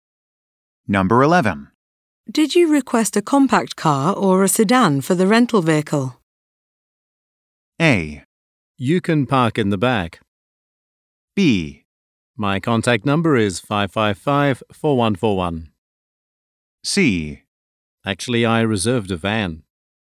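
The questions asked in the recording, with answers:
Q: Did you request a compact car or a sedan for the rental vehicle?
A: C: Actually, I reserved a van.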